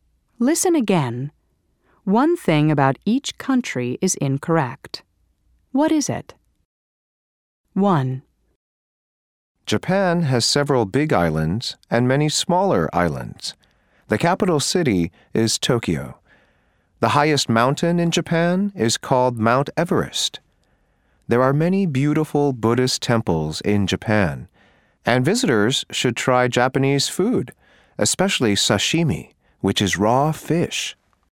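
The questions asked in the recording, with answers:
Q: What is it?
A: The highest mountain in Japan is not Mount Everest (it is Mount Fuji).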